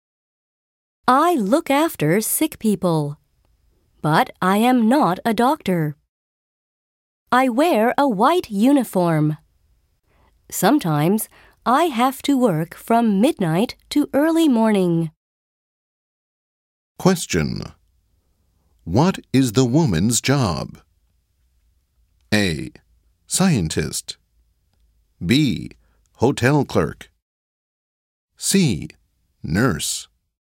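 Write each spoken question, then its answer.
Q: What is the woman's job?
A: C: Nurse.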